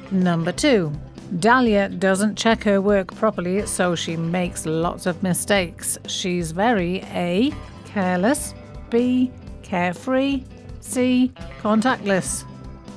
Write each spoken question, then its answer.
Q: Dahlia doesn't check her work properly, so she makes lots of mistakes. She's very A, careless, B, carefree, C, contactless.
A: And the answer is A, careless.